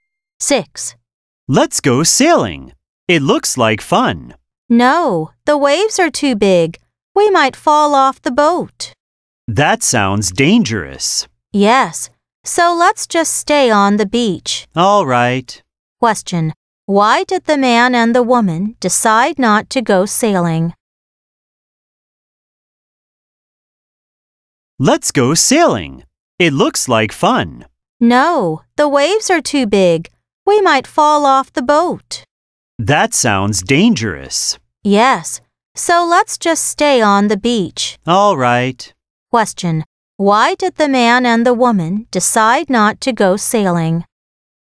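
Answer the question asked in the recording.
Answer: The waves were too big, so it was dangerous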